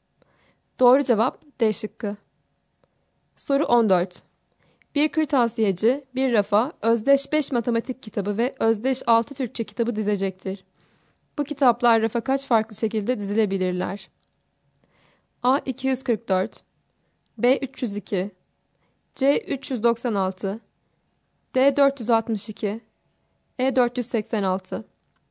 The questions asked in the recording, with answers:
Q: Bu kitaplar rafa kaç farklı şekilde dizilebilirler?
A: Doğru cevap D şıkkı.